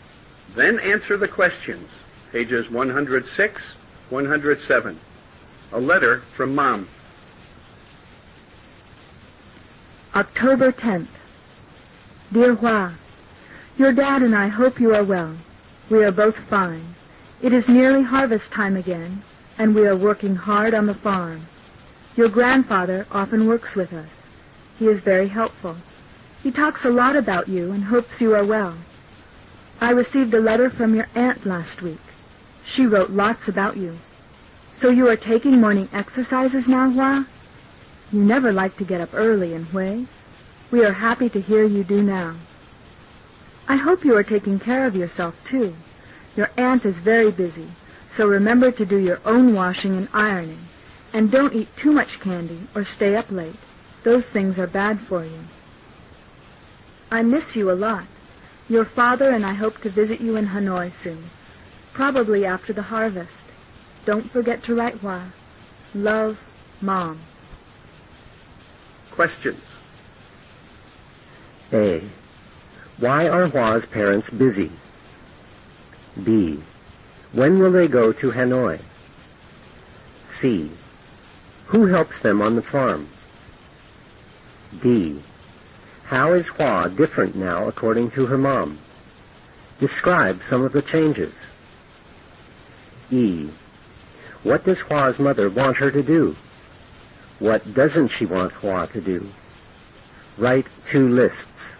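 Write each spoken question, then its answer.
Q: Why are Hua's parents busy?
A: It is nearly harvest time and they are working hard on the farm

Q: When will they go to Hanoi?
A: Soon, probably after the harvest

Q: Who helps them on the farm?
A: Hua's grandfather

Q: How is Hua different now according to her mom?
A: She gets up early and takes morning exercises now

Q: What does Hua's mother want her to do?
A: Take care of herself and do her own washing and ironing; not eat too much candy or stay up late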